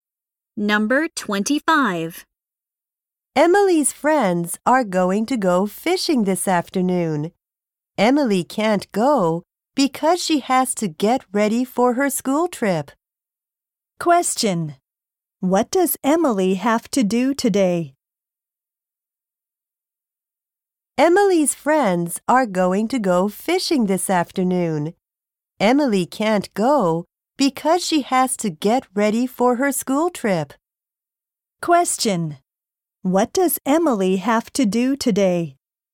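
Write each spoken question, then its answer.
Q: What does Emily have to do today?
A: Get ready for her school trip.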